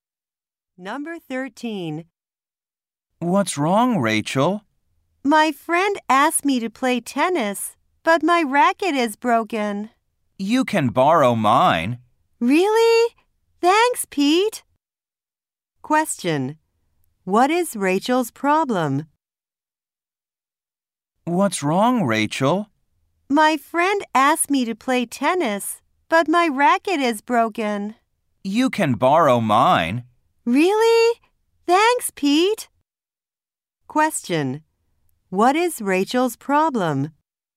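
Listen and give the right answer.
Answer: Her tennis racket is broken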